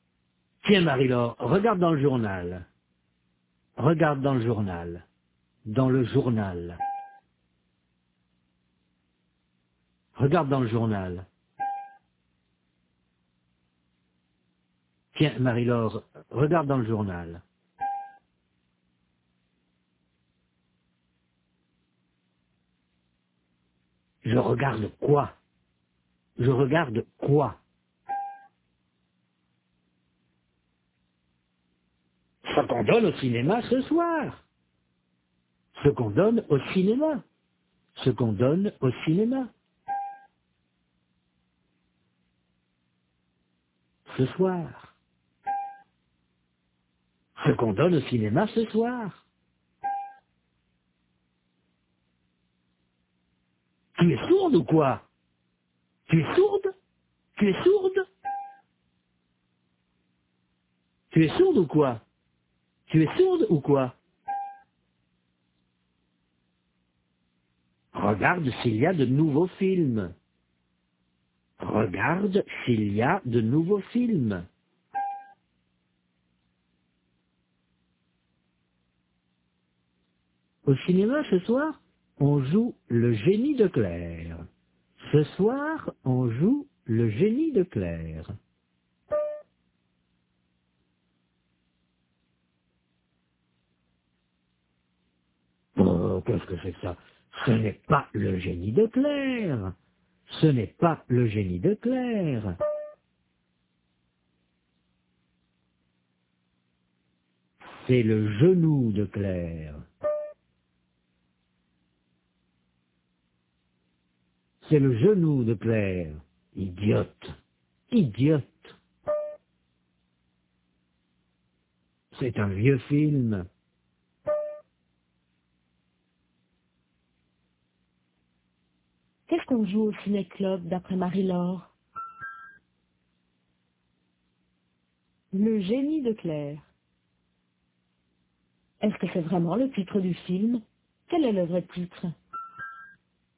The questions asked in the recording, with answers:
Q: Qu'est-ce qu'on joue au ciné-club d'après Marie-Laure?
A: Le génie de Claire.

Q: Quel est le vrai titre?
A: C'est le genou de Claire.